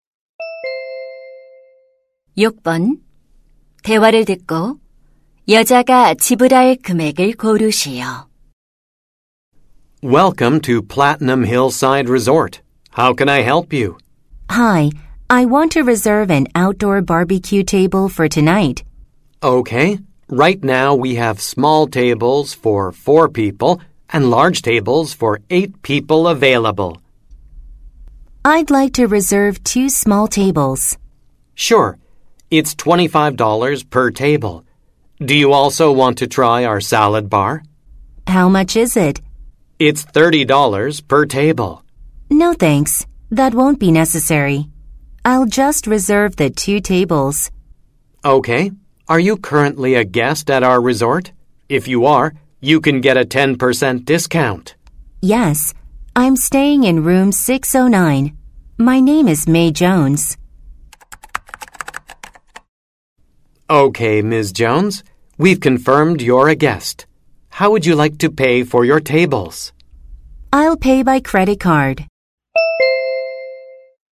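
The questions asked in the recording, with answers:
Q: 대화를 듣고 여자가 지불할 금액을 고르시오.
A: $45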